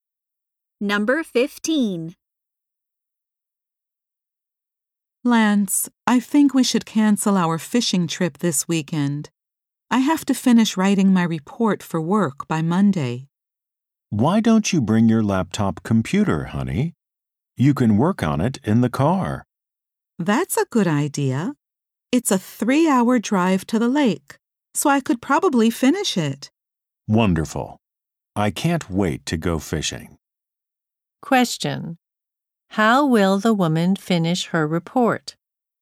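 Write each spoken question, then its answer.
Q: How will the woman finish her report?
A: By working on her laptop in the car on the drive to the lake.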